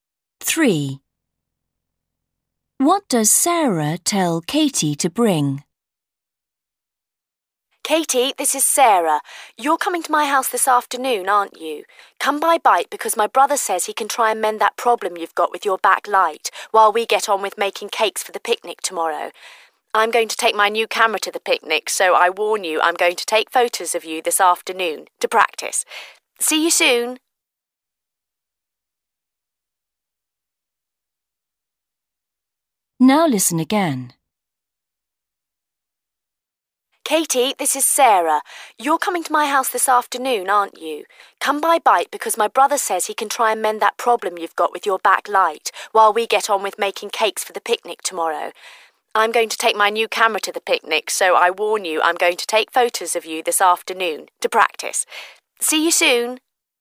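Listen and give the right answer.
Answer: her bike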